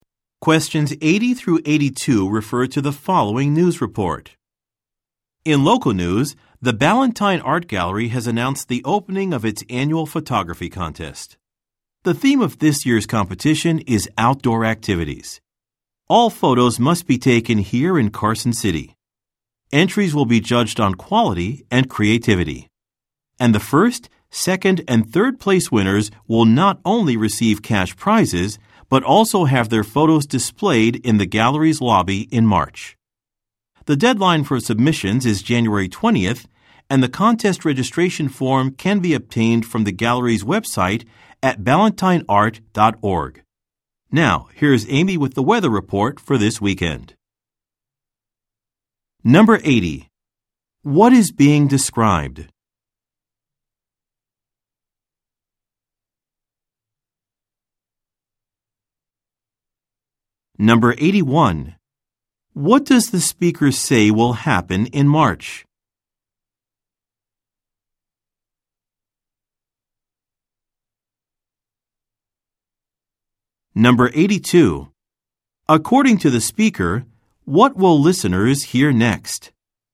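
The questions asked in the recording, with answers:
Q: What is being described?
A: An annual photography contest at the Ballantine Art Gallery

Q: What does the speaker say will happen in March?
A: The winners' photos will be displayed in the gallery's lobby

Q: According to the speaker, what will listeners hear next?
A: A weather report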